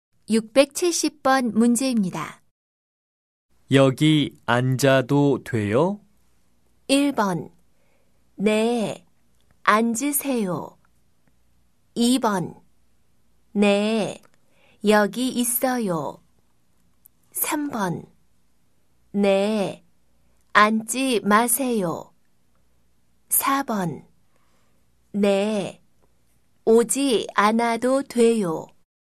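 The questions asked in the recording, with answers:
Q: 여기 앉아도 돼요?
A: 1: 네, 앉으세요.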